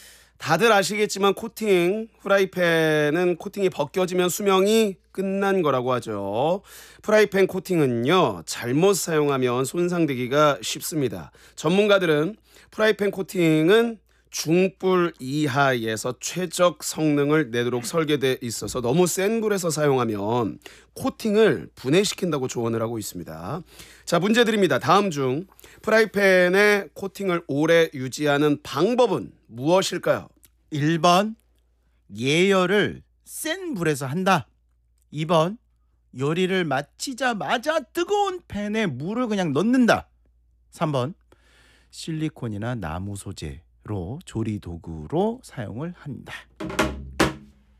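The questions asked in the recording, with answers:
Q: 다음 중 프라이팬의 코팅을 오래 유지하는 방법은 무엇일까요?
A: 3: 실리콘이나 나무 소재로 조리 도구로 사용을 한다.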